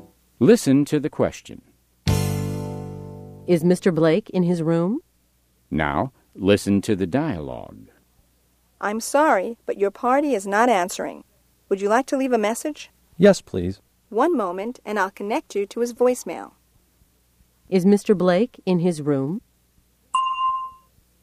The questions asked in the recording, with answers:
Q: Is Mr. Blake in his room?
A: No, he isn't.